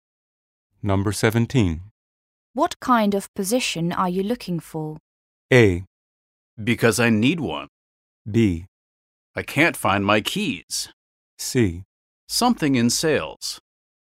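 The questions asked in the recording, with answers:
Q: What kind of position are you looking for?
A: C: Something in sales.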